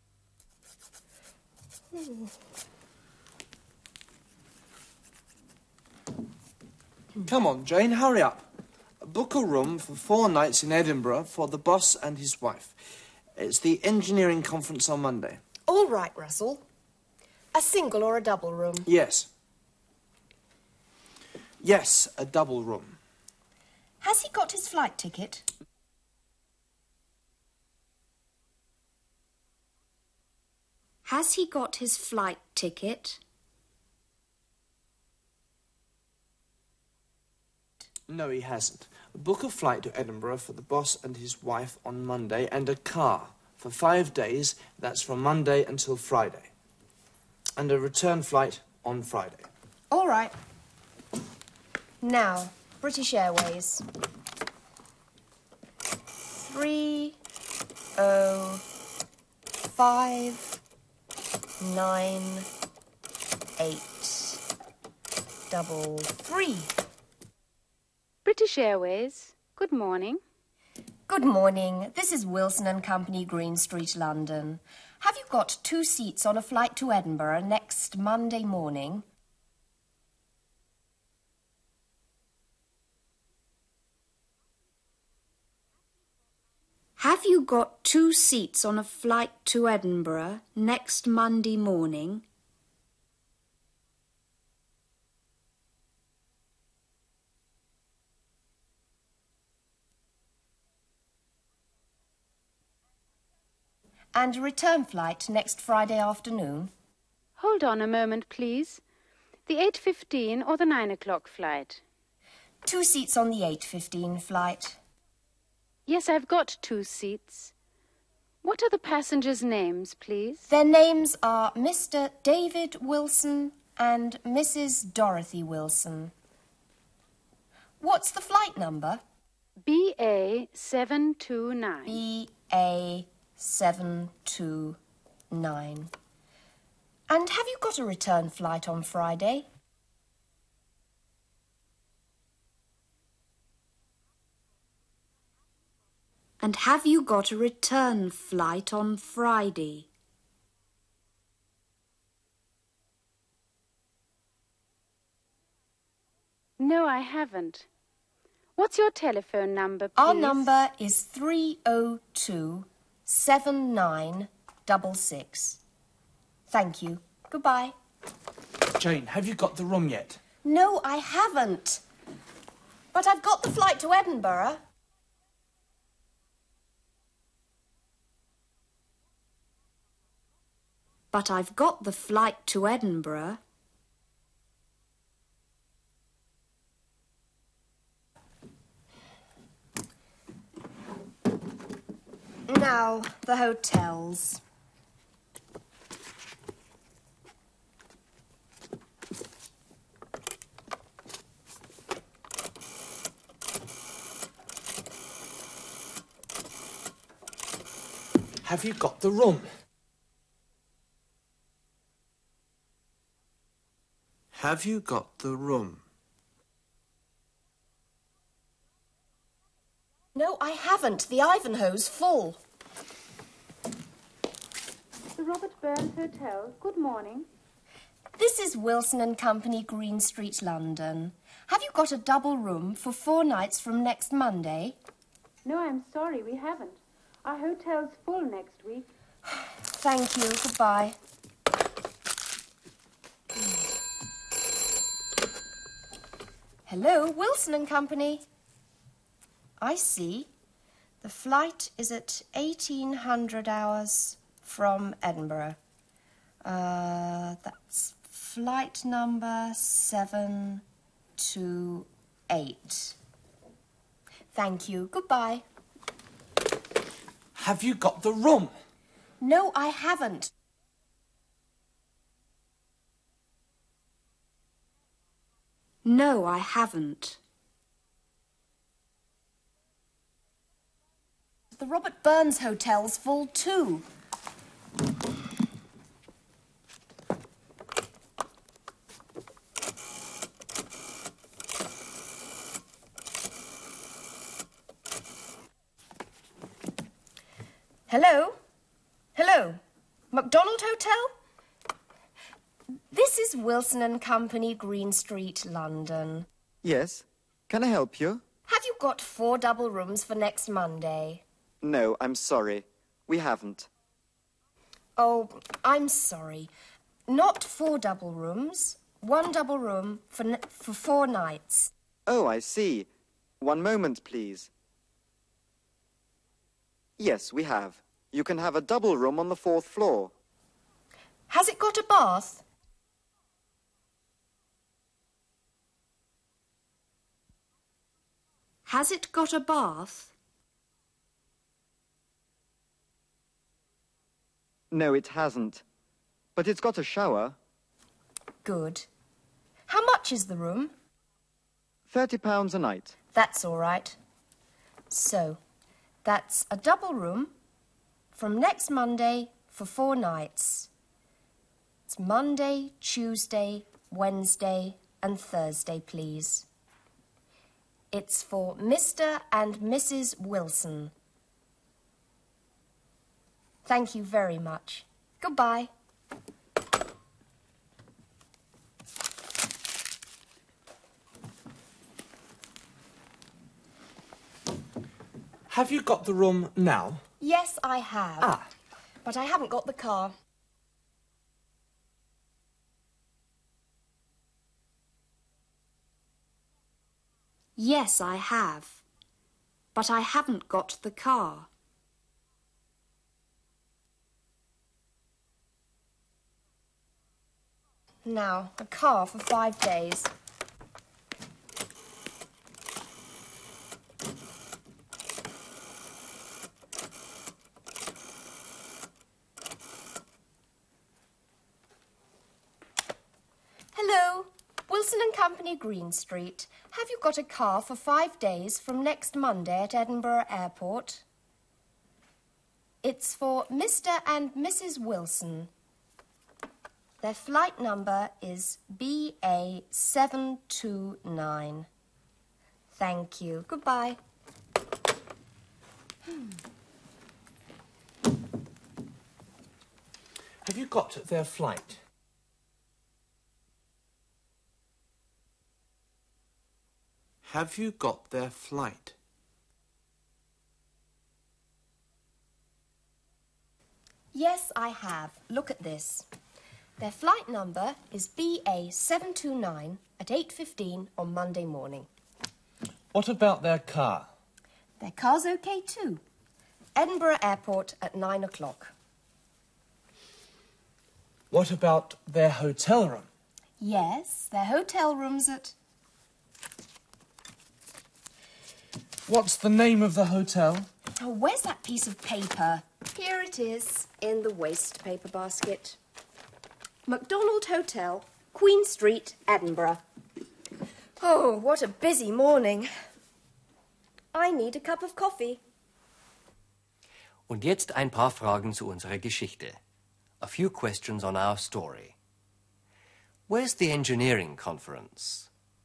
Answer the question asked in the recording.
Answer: It's in Edinburgh.